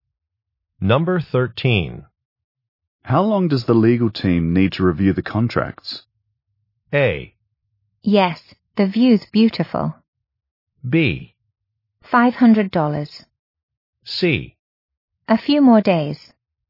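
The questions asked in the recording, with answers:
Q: How long does the legal team need to review the contracts?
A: C: A few more days.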